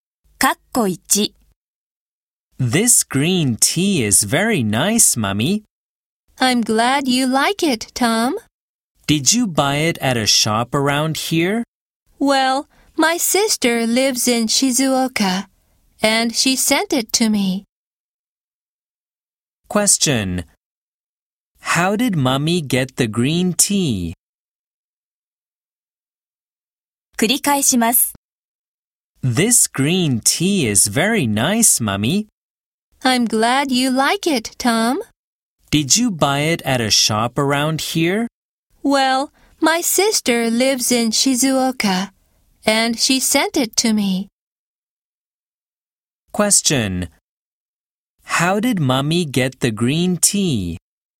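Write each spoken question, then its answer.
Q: How did Mummy get the green tea?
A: Her sister in Shizuoka sent it to her.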